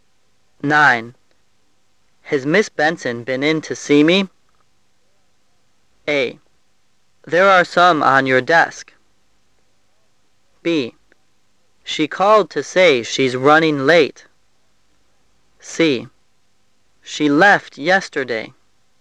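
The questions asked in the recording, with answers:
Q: Has Miss Benson been in to see me?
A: B: She called to say she's running late.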